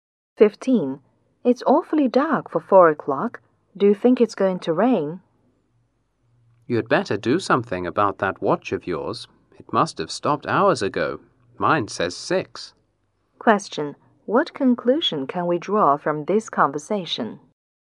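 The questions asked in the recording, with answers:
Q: What conclusion can we draw from this conversation?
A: The man's watch has stopped; it's about 6, not 4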